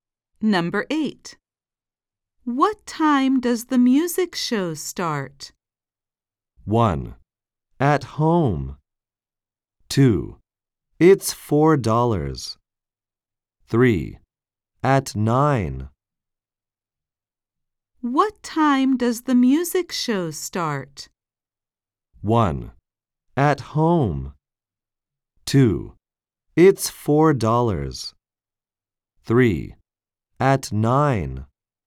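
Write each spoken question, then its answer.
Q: What time does the music show start?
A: 3: At 9.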